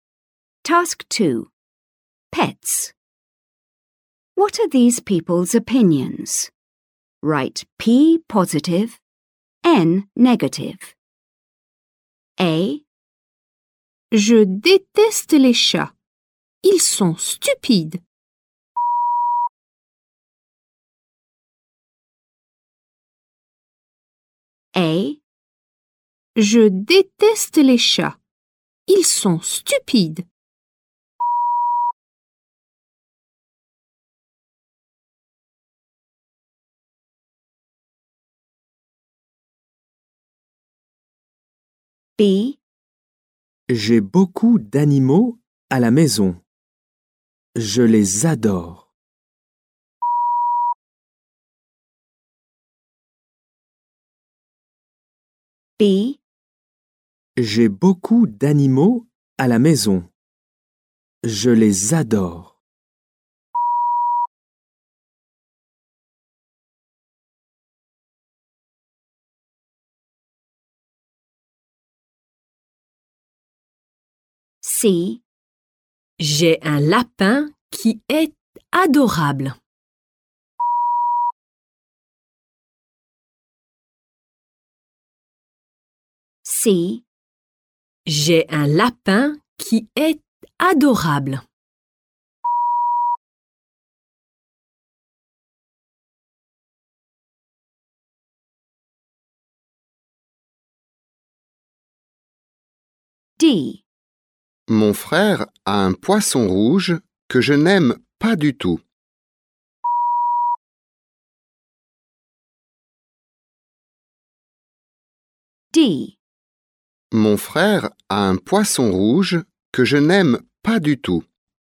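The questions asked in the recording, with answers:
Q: Pets. What are these people's opinions?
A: N: negative

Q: Pets. What are these people's opinions?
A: P: positive

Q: Pets. What are these people's opinions?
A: P: positive

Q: Pets. What are these people's opinions?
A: N: negative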